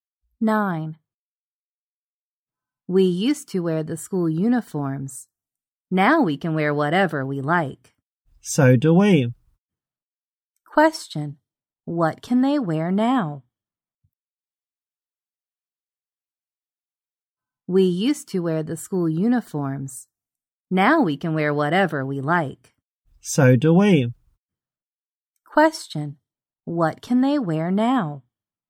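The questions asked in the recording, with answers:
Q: What can they wear now?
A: Whatever they like.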